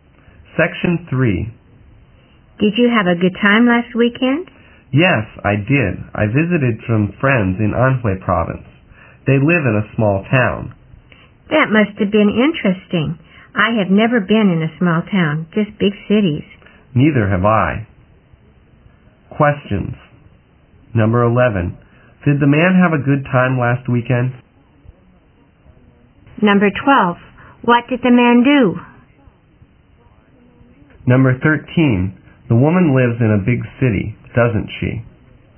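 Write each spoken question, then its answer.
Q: Did the man have a good time last weekend?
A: Yes, he did.

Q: What did the man do?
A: He visited some friends in Anhui province.

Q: The woman lives in a big city, doesn't she?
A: Yes, she does.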